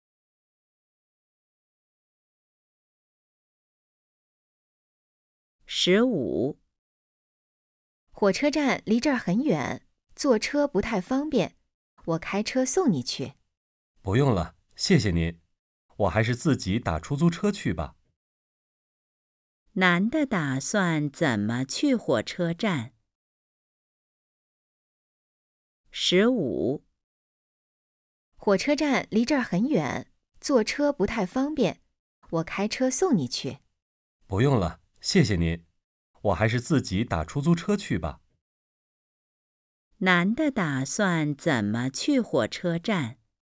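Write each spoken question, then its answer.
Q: 男的打算怎么去火车站?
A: 打出租车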